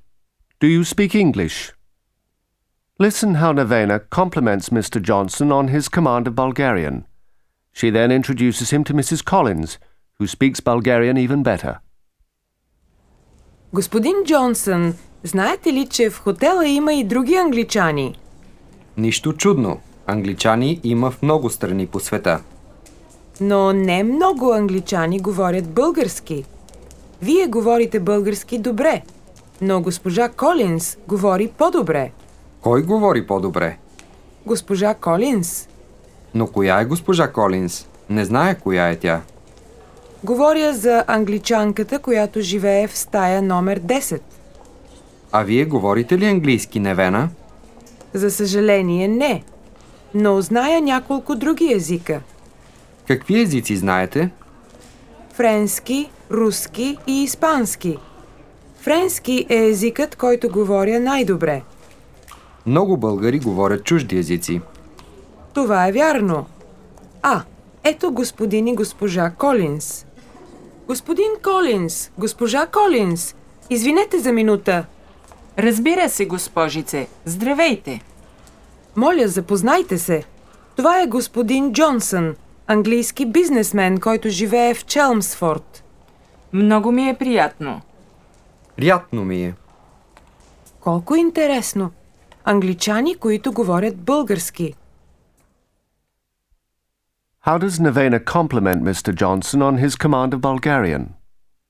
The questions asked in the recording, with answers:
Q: How does Navena compliment Mr. Johnson on his command of Bulgarian?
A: Вие говорите български добре.